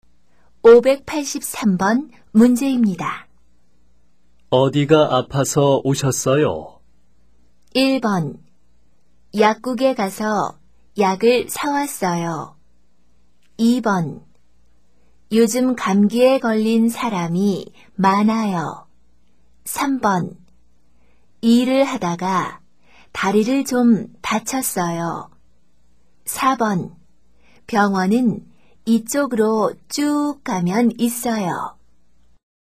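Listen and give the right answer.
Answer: 3: 일을 하다가 다리를 좀 다쳤어요.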